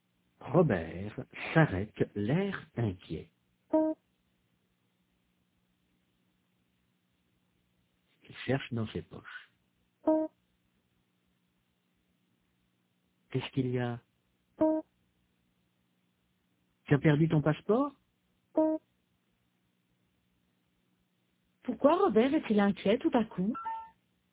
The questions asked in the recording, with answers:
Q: Pourquoi Robert est-il inquiet tout à coup?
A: Parce qu'il n'a pas son passeport.